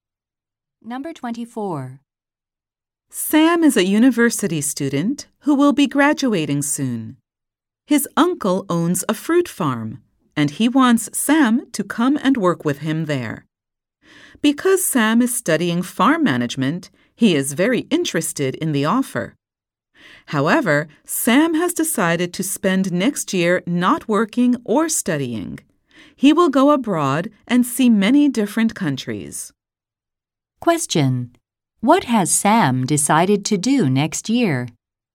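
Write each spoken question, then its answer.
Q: What has Sam decided to do next year?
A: Travel abroad to see many countries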